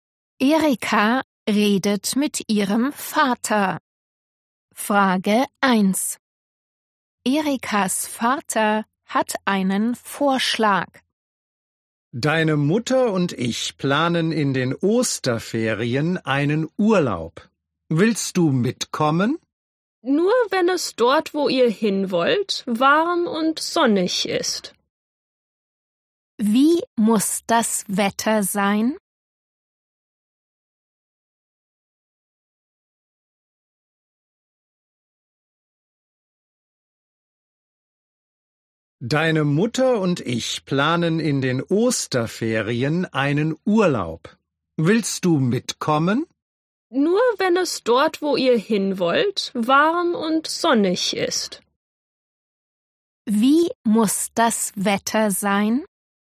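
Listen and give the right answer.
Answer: warm und sonnig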